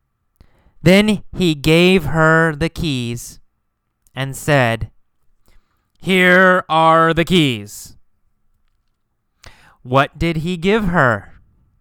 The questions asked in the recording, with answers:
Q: What did he give her?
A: The keys, right? The keys to his car.